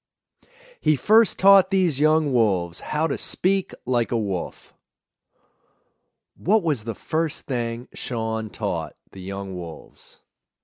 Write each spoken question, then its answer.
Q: What was the first thing Sean taught the young wolves?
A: Sean first taught the young wolves to speak like a wolf.